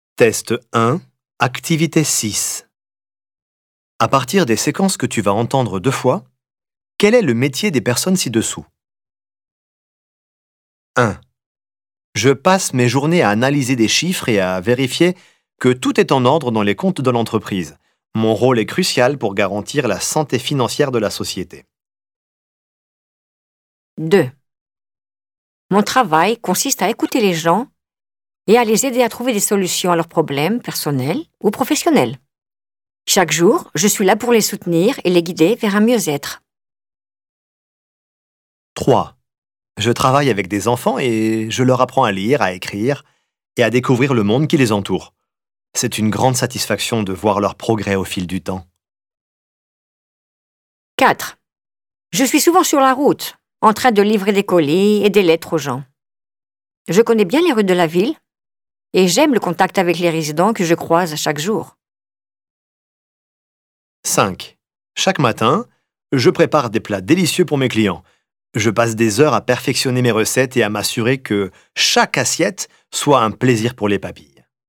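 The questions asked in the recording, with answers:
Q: quel est le métier des personnes ci-dessous?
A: comptable

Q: quel est le métier des personnes ci-dessous?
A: instituteur / professeur des écoles

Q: quel est le métier des personnes ci-dessous?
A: facteur

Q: quel est le métier des personnes ci-dessous?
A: cuisinier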